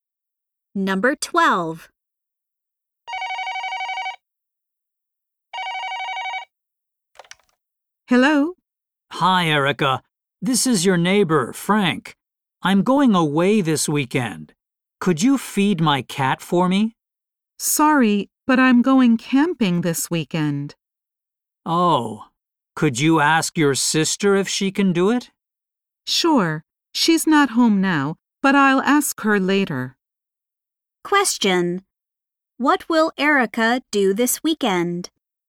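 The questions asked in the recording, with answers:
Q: What will Erica do this weekend?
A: Go camping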